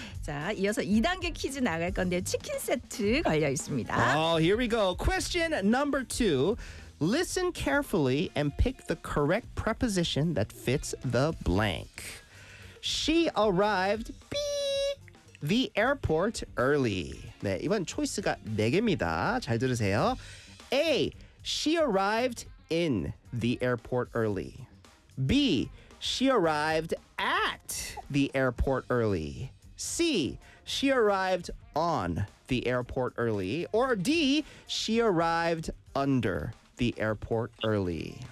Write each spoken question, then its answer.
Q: Listen carefully and pick the correct preposition that fits the blank.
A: The answer is B. At the airport.